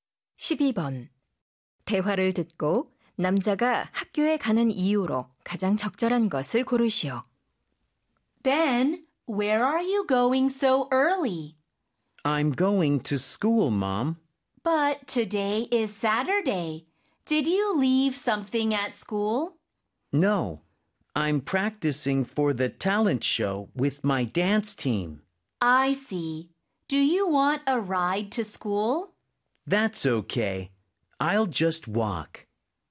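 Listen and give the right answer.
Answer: 댄스팀과 장기자랑 연습을 하기 위해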